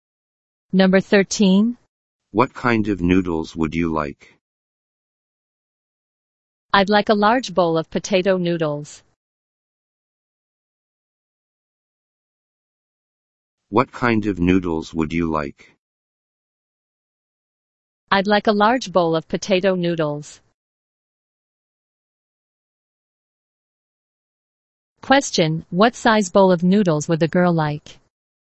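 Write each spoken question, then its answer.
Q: Question, what size bowl of noodles would the girl like?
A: A large bowl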